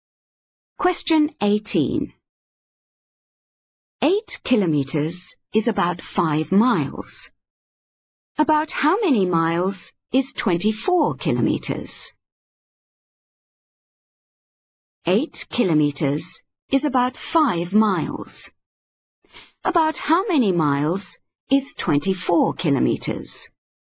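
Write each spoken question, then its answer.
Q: About how many miles is 24 kilometers?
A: 15 miles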